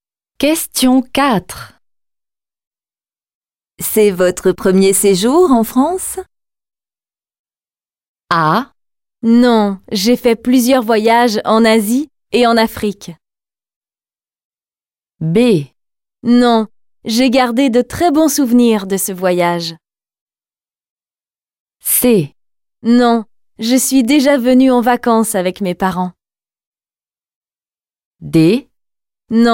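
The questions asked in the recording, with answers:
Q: C'est votre premier séjour en France?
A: C: Non, je suis déjà venue en vacances avec mes parents.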